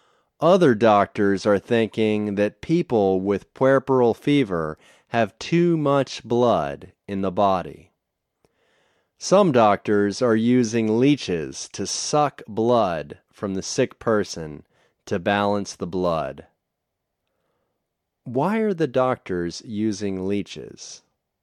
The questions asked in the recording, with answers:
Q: Why are the doctors using leeches?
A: They are using leeches to suck blood from the sick person to balance the blood.